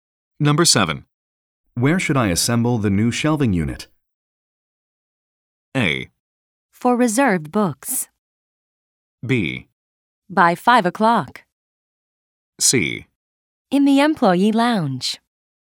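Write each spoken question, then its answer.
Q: Where should I assemble the new shelving unit?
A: C: In the employee lounge.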